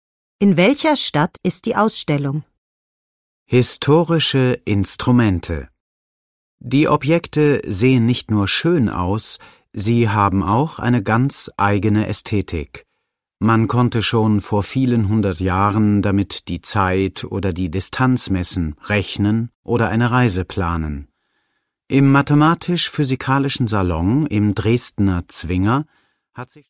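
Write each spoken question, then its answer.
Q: In welcher Stadt ist die Ausstellung?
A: In Dresden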